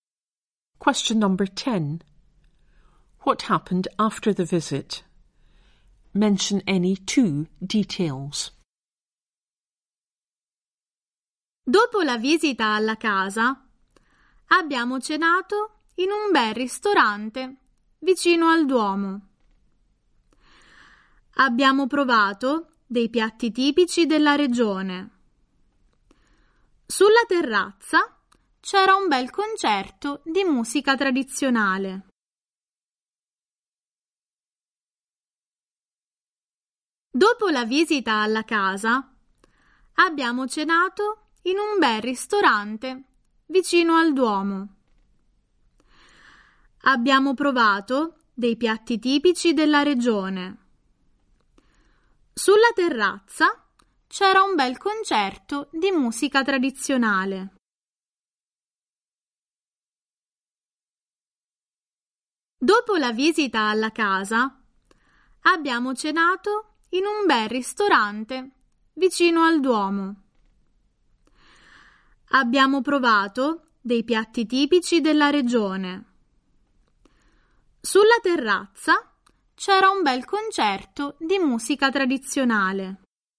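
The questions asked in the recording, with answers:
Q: What happened after the visit?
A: Dinner at a restaurant near the cathedral, tried local dishes, concert of traditional music on the terrace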